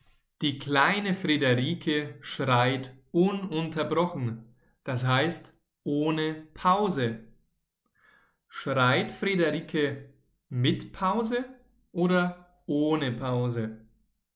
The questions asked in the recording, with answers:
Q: Schreit Friederike mit Pause oder ohne Pause?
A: Ohne Pause. Die kleine Friederike schreit ohne Pause, ununterbrochen.